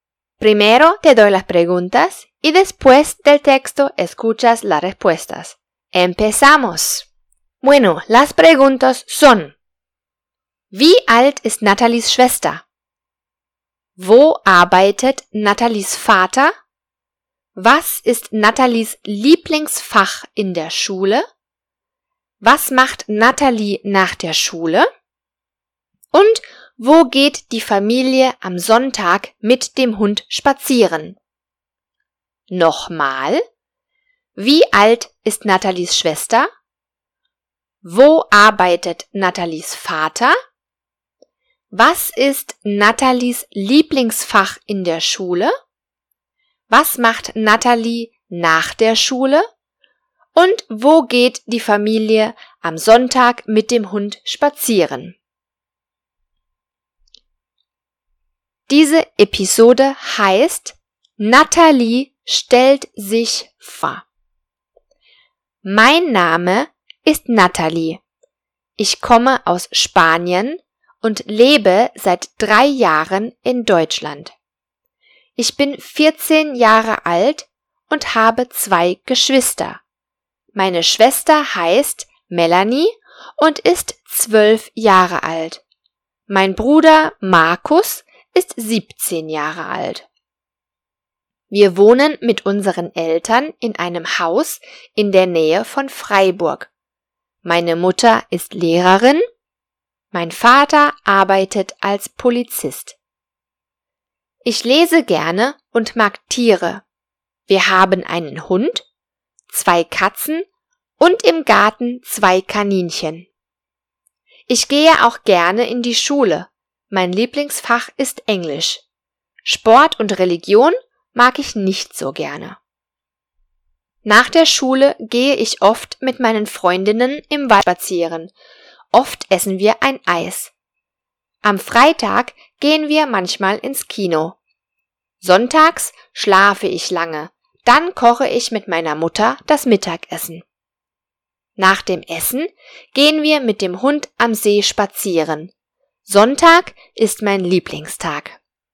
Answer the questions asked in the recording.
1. Melanie ist zwölf Jahre alt.
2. Er arbeitet bei der Polizei.
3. Englisch ist ihr Lieblingsfach.
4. Sie geht mit ihren Freundinnen im Wald spazieren.
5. Die Familie geht am See spazieren.